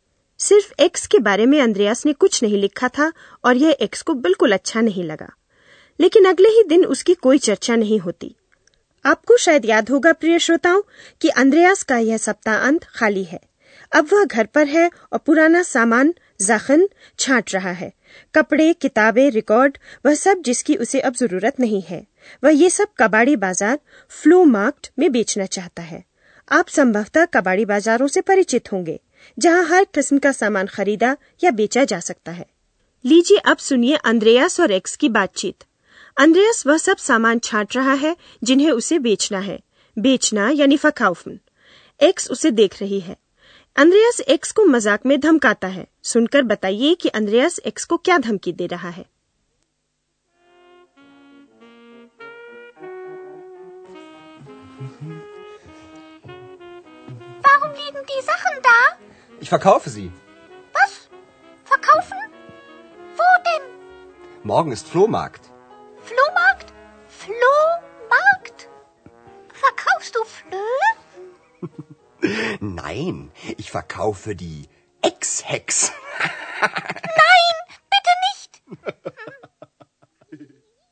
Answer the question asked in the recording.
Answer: Andreas x को धमका रहा है कि वह उसे भी बाकी सामानों की तरह ही बेच देगा